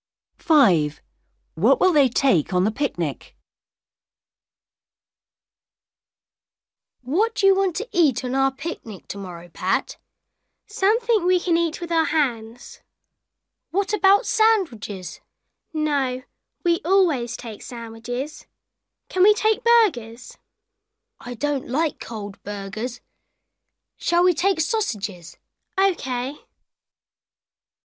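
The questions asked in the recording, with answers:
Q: What will they take on the picnic?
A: Sausages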